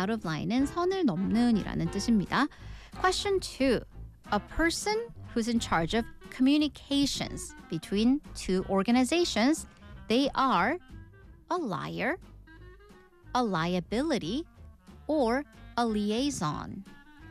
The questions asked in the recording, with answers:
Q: A person who's in charge of communications between two organizations, they are a liar, a liability, or a liaison.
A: liaison, 연락 담당책이었습니다.